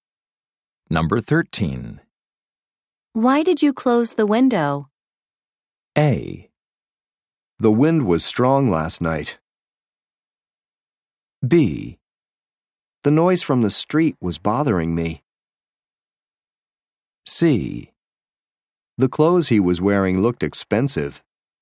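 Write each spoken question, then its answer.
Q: Why did you close the window?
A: B: The noise from the street was bothering me.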